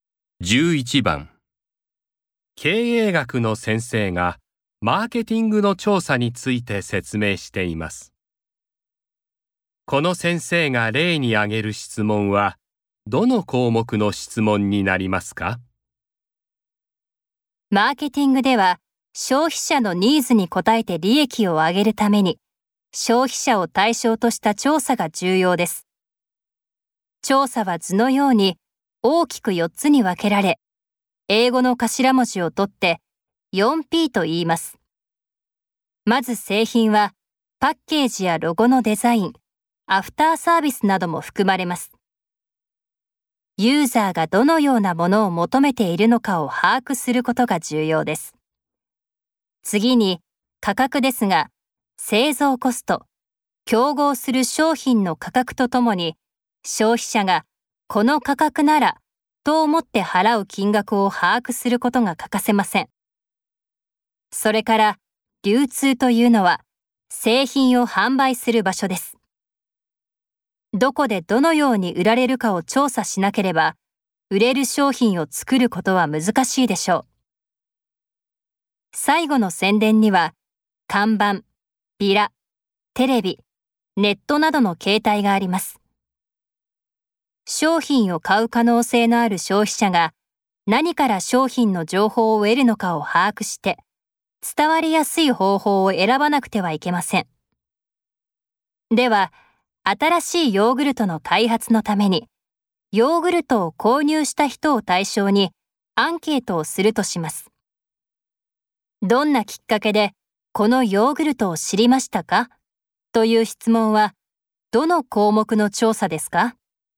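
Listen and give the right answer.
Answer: 宣伝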